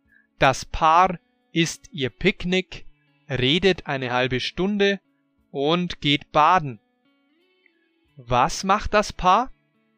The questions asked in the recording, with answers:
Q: Was macht das Paar?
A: Das Paar, also Alejandro und Martina, isst ihr Picknick, redet eine halbe Stunde und geht baden.